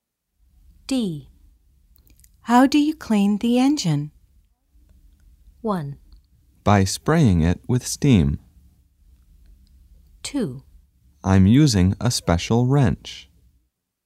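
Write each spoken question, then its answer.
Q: How do you clean the engine?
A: 1: By spraying it with steam.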